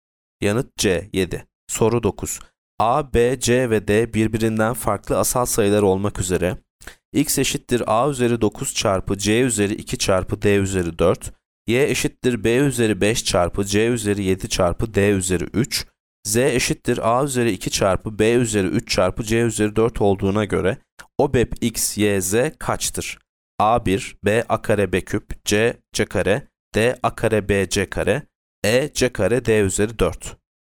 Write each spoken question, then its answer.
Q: A, B, C ve D birbirinden farklı asal sayılar olmak üzere x eşittir A üzeri 9 çarpı C üzeri 2 çarpı D üzeri 4, y eşittir B üzeri 5 çarpı C üzeri 7 çarpı D üzeri 3, z eşittir A üzeri 2 çarpı B üzeri 3 çarpı C üzeri 4 olduğuna göre OBEP x, y, z kaçtır?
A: Yanıt C, C kare.